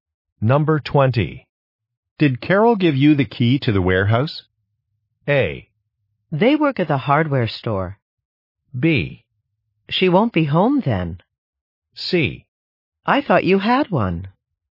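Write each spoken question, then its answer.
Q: Did Carol give you the key to the warehouse?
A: C: I thought you had one.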